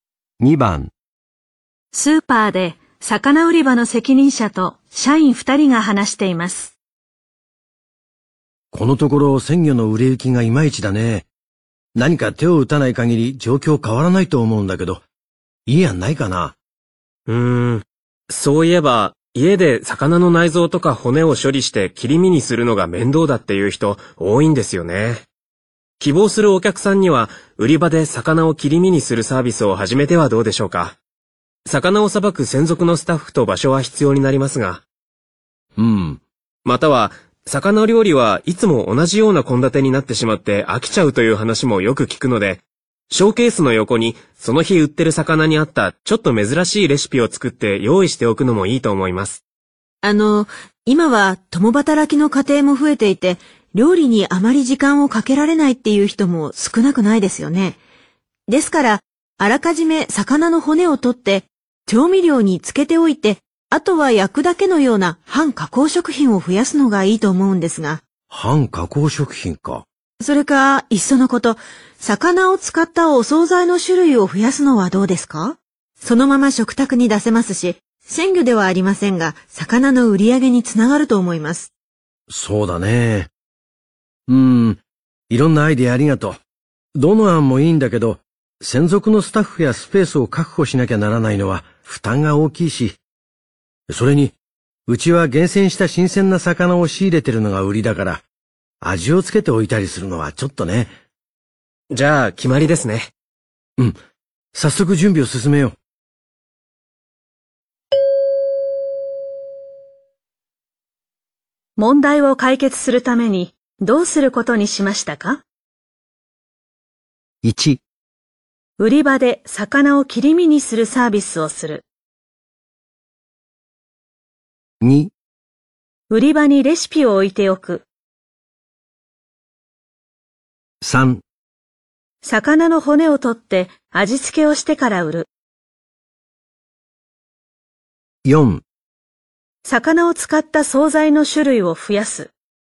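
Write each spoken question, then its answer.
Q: 問題を解決するためにどうすることにしましたか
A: 2: 売り場にレシピを置いておく。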